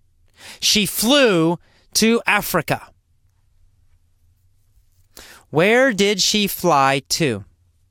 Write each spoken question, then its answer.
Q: Where did she fly to?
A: To Africa. She flew to Africa.